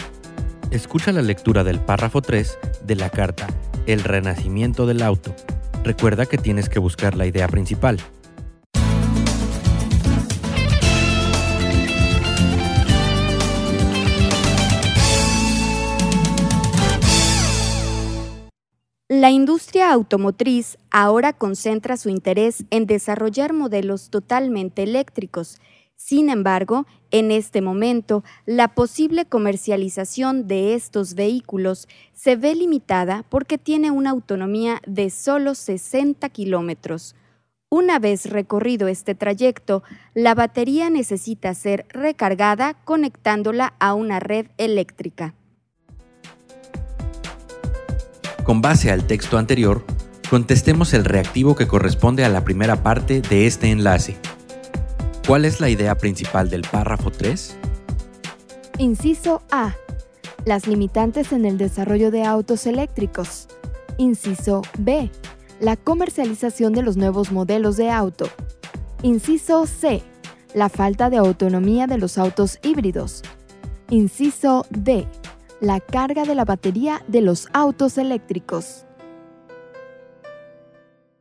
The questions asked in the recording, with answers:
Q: ¿Cuál es la idea principal del párrafo 3?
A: Por lo tanto, la respuesta correcta es el inciso A, las limitantes en el desarrollo de autos eléctricos.